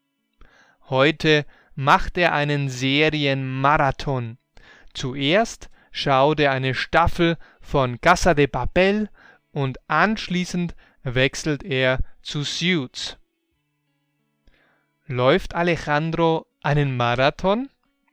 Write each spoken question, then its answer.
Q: Läuft Alejandro einen Marathon?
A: Nein, er läuft nicht einen echten Marathon.